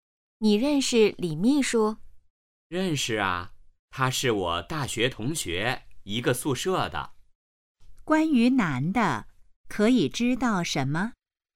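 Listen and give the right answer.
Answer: 他和李秘书是大学同学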